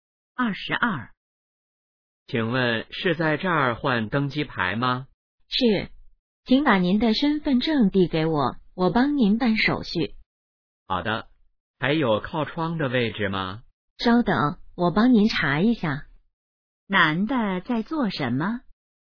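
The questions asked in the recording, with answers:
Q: 男的在做什么?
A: 换登机牌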